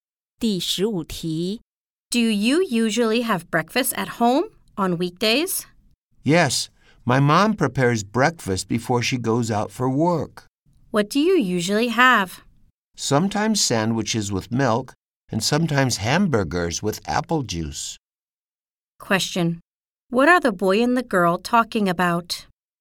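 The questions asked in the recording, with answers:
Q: Question.What are the boy and the girl talking about?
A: Breakfast on weekdays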